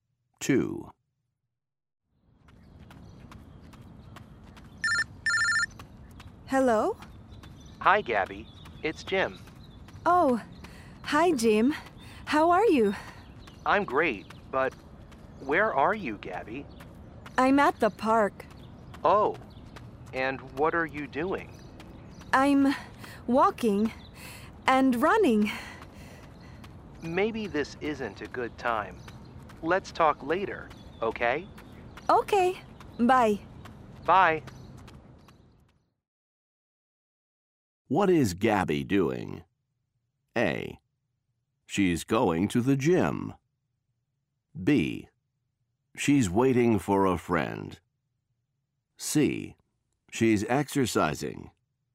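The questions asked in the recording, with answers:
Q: What is Gabby doing?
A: C: She's exercising.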